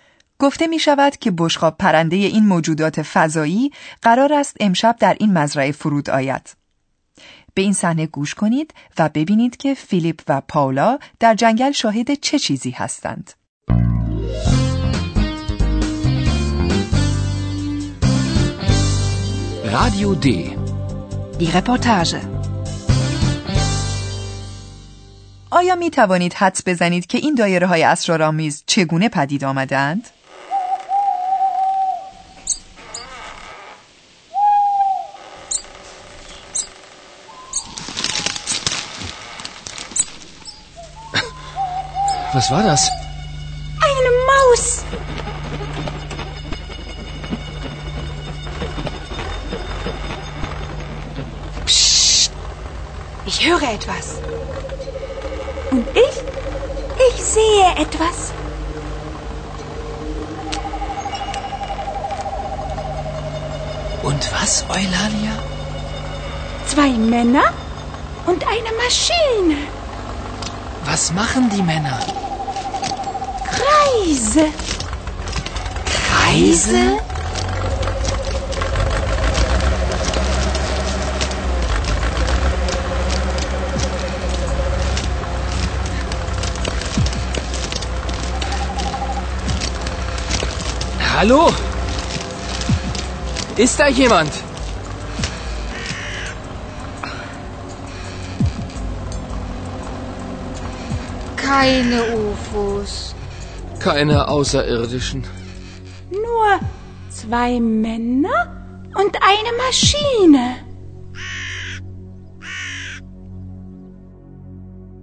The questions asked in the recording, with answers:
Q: به این صحنه گوش کنید و ببینید که فیلیپ و پاولا در جنگل شاهد چه چیزی هستند.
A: دو مرد که احتمالاً از دهقانان همین روستا هستند با یک ماشین، احتمالاً ماشین درو، مزرعه غلات را دایره وار درو می کنند.